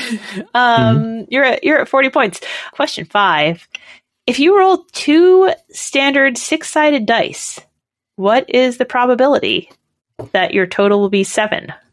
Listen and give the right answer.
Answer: It is 1 out of 6.